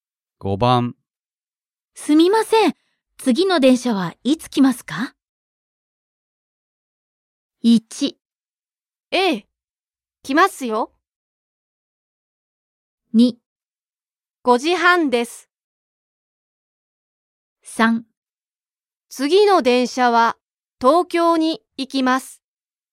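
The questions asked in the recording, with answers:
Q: すみません、次の電車はいつ来ますか?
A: 2: 5時半です。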